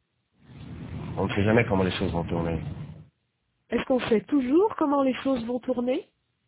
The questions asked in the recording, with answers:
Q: Est-ce qu'on sait toujours comment les choses vont tourner?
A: Non. On ne sait jamais comment les choses vont tourner.